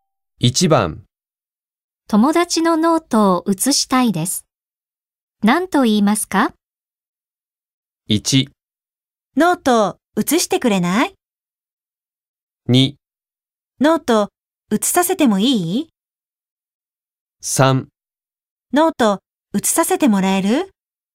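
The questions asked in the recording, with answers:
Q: 友達のノートを写したいです。何と言いますか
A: 3: ノート写させてもらえる?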